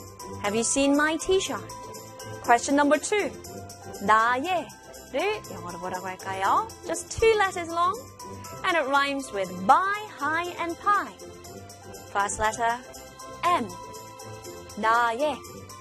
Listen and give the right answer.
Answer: My.